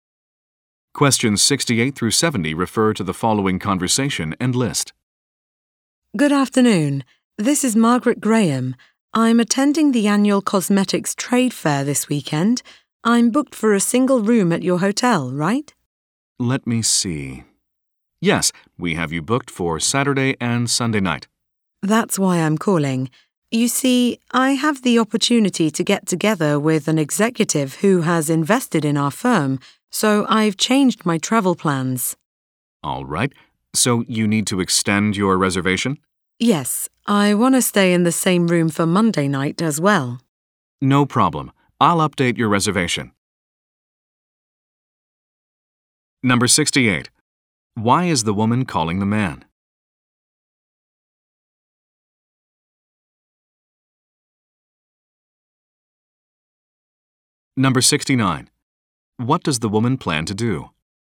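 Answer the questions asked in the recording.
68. To extend her reservation
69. Meet an executive who invested in her firm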